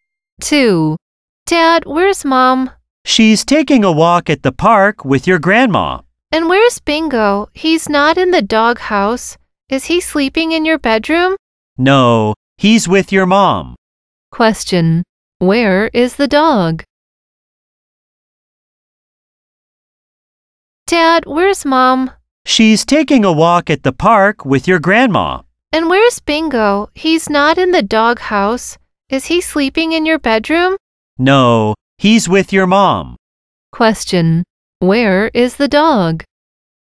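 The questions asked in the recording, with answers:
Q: Where is the dog?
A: At the park with Mom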